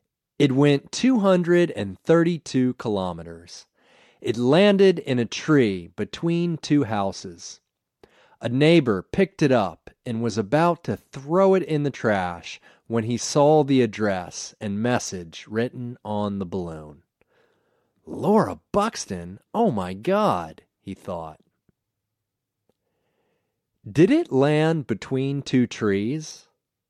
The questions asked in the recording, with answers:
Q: Did it land between two trees?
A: No, it didn't land between two trees.